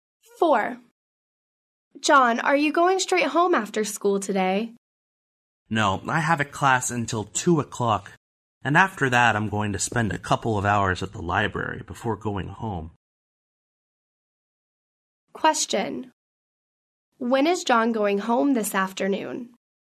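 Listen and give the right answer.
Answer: At about 4 o'clock, after class and a couple of hours at the library.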